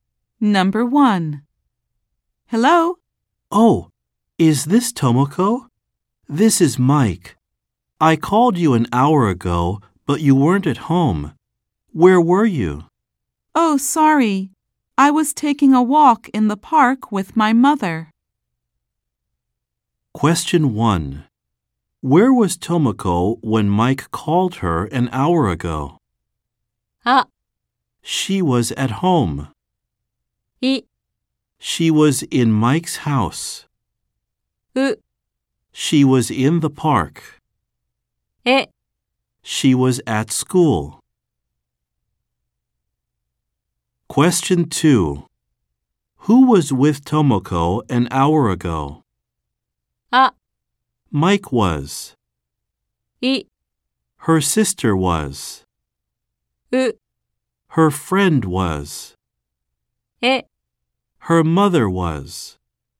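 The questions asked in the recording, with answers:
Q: Where was Tomoko when Mike called her an hour ago?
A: う: She was in the park.

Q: Who was with Tomoko an hour ago?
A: え: Her mother was.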